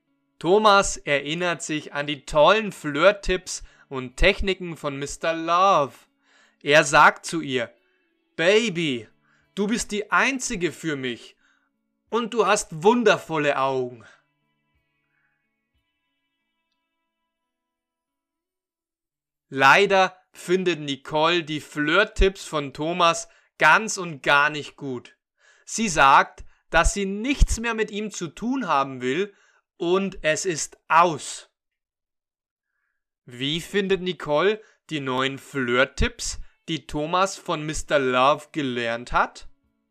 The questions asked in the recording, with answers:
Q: Wie findet Nicole die neuen Flirt-Tipps, die Thomas von Mr.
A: Sie findet diese Tipps ganz und gar nicht gut.